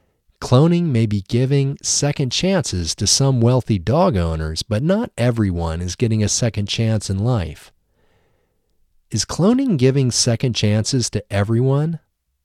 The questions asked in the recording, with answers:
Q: Is cloning giving second chances to everyone?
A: No, cloning isn't giving second chances to everyone.